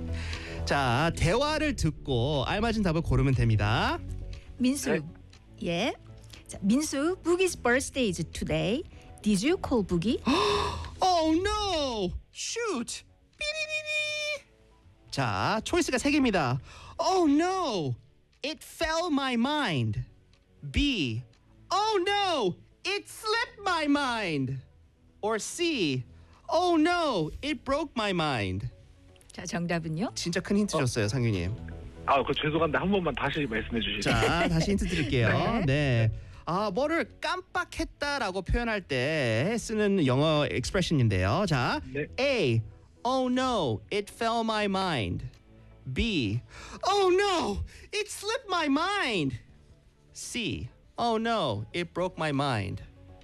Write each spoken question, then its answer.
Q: 자, 정답은요?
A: 감이 맞았습니다.